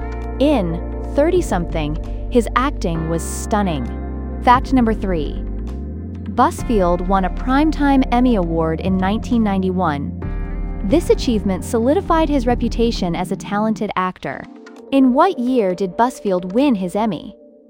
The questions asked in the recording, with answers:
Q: In what year did Busfield win his Emmy?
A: 1991.